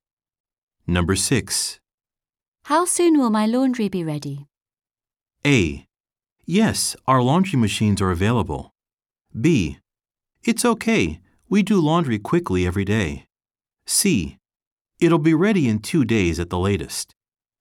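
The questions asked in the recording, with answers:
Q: How soon will my laundry be ready?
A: C: It'll be ready in 2 days at the latest.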